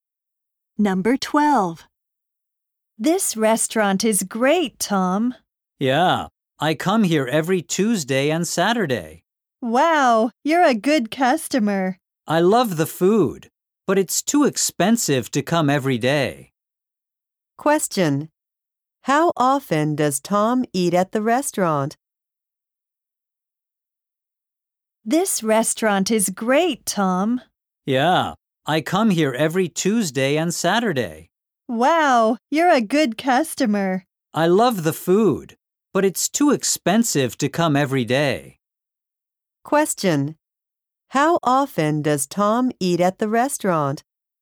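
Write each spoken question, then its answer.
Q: How often does Tom eat at the restaurant?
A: Twice a week (Tuesdays and Saturdays)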